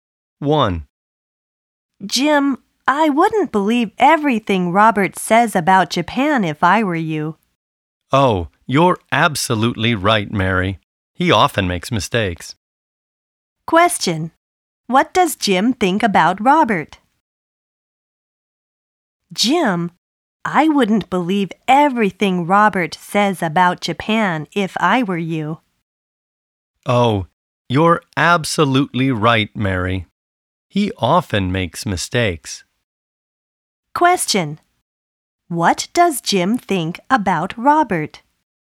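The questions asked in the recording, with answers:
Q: What does Jim think about Robert?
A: He often makes mistakes.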